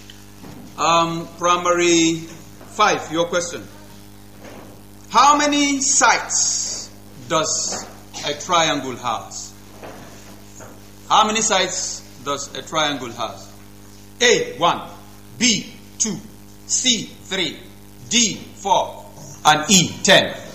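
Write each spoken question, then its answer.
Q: How many sides does a triangle have?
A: C: 3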